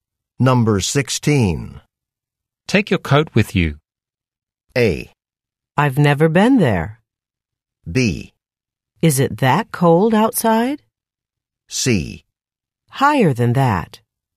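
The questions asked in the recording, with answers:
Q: Take your coat with you.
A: B: Is it that cold outside?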